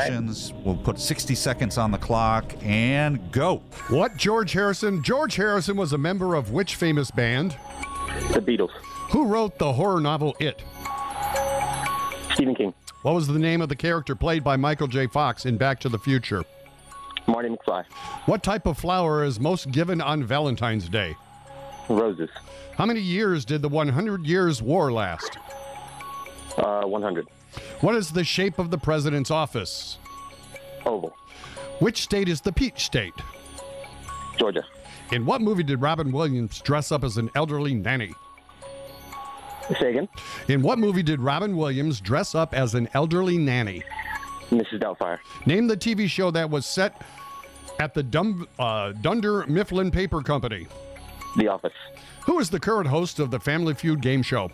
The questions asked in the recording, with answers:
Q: George Harrison was a member of which famous band?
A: you said George Harrison was a Beatle.

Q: Who wrote the horror novel It?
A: It was Stephen King.

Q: What type of flower is most given on Valentine's Day?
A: More specifically, the red rose.

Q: What is the shape of the president's office?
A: The shape of the president's office is oval.

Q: Which state is the Peach State?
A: Georgia is the Peach State, correct.

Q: In what movie did Robin Williams dress up as an elderly nanny?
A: Robin Williams was Mrs. Doubtfire, correct.

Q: Name the TV show that was set at the Dunder Mifflin Paper Company.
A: Dunder Mifflin Paper Company was The Office Show, correct.